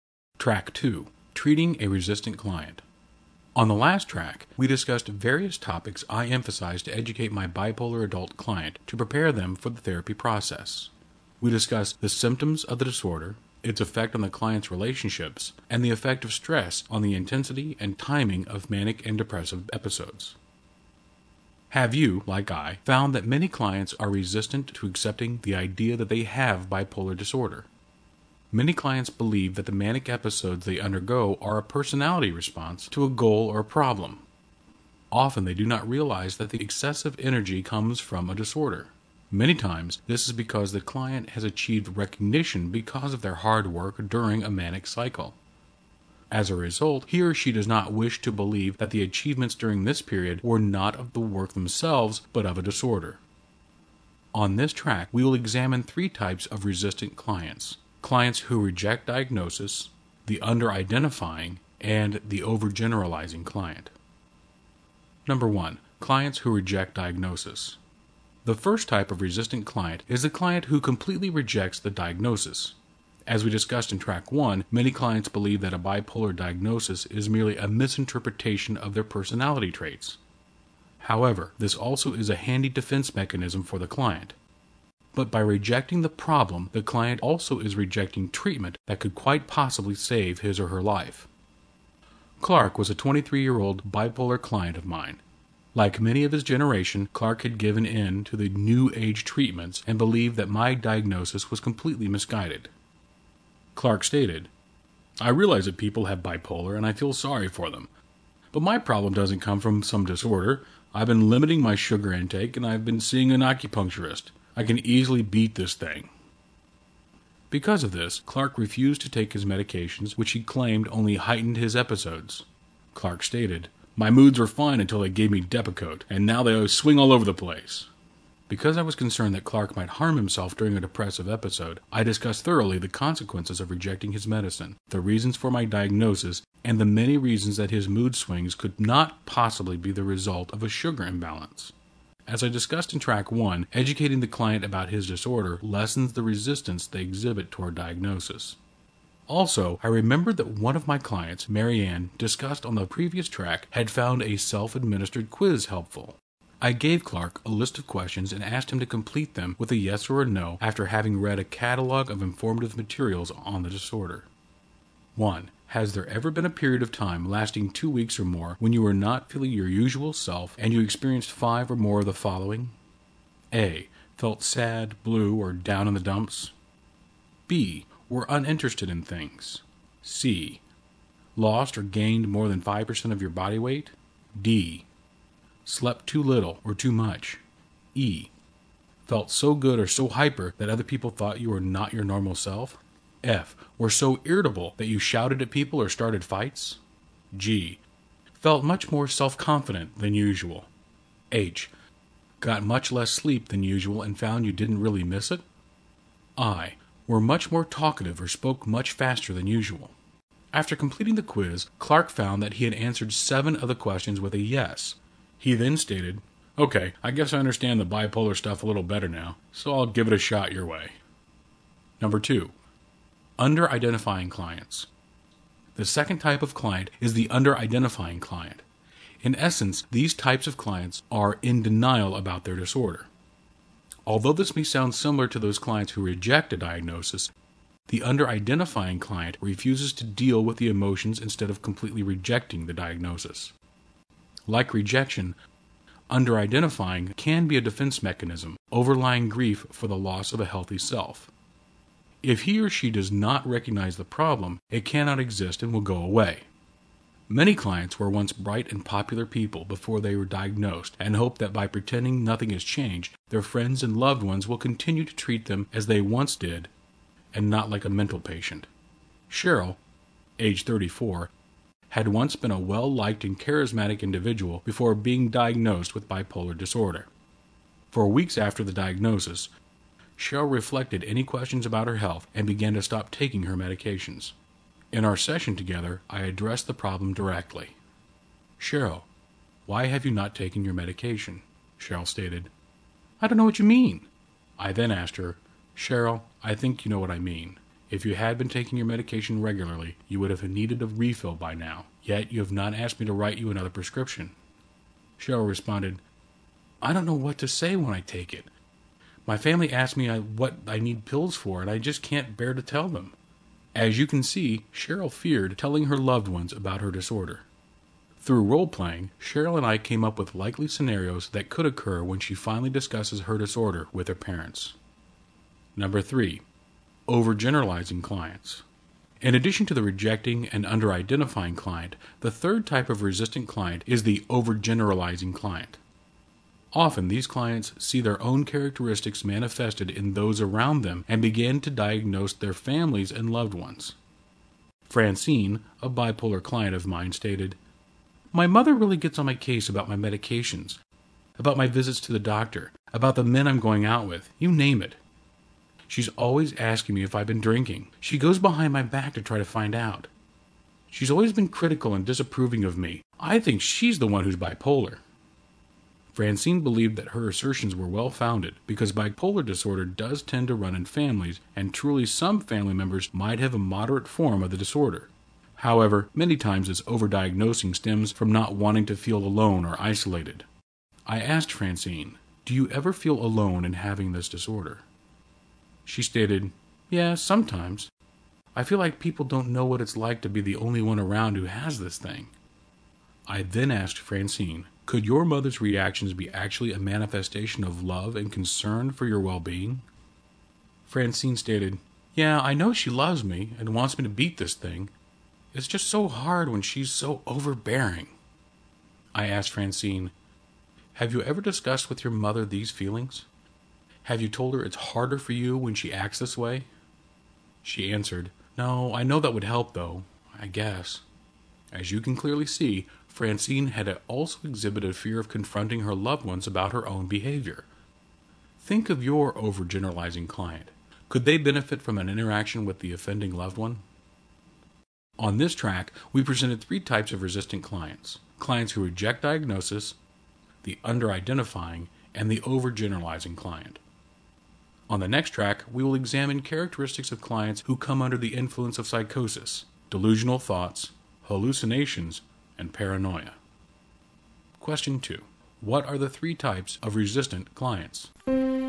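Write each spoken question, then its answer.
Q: What are the three types of resistant clients?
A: Clients who reject diagnosis, under-identifying clients, and overgeneralizing clients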